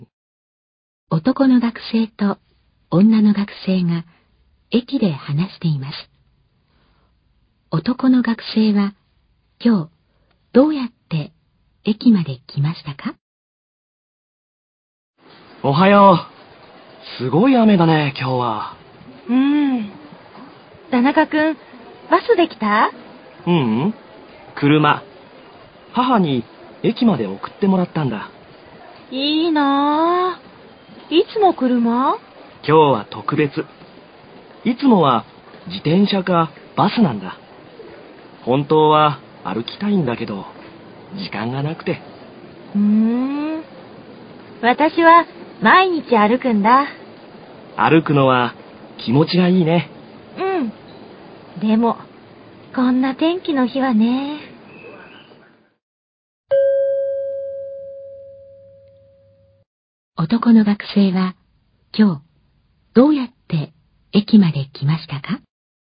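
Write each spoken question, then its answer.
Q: 男の学生は、今日、どうやって駅まで来ましたか?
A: 車(母に送ってもらった)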